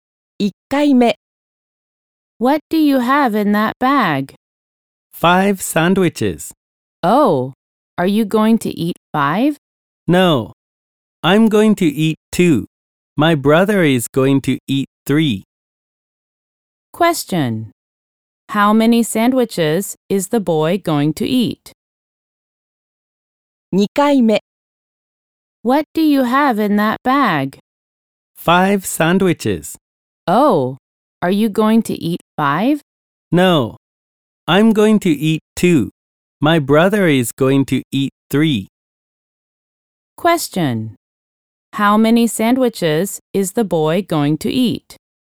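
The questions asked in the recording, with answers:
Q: How many sandwiches is the boy going to eat?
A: Two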